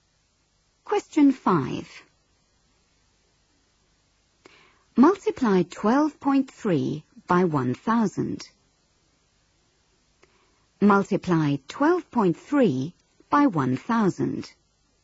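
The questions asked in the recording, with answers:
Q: Multiply 12.3 by 1,000.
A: 12300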